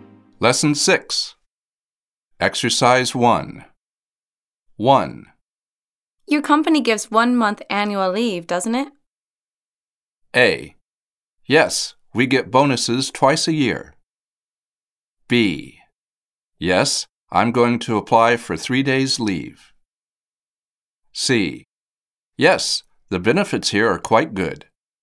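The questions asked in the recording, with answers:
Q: Your company gives 1 month annual leave, doesn't it?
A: C: Yes, the benefits here are quite good.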